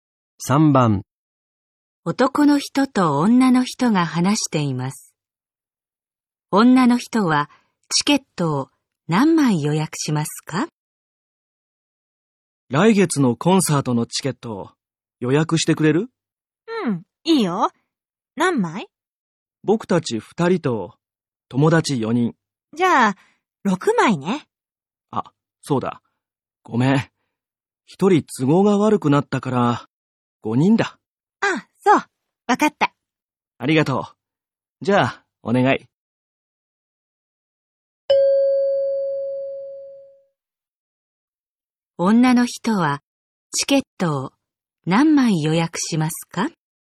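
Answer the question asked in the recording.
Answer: 5枚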